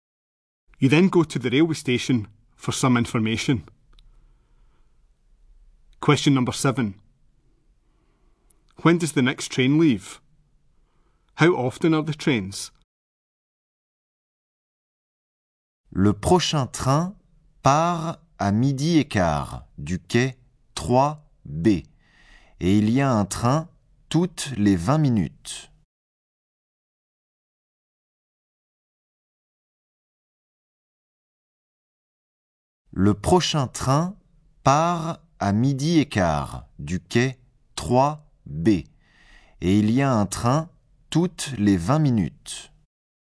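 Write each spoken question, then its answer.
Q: When does the next train leave?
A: At quarter past twelve (platform 3B)

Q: How often are the trains?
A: Every 20 minutes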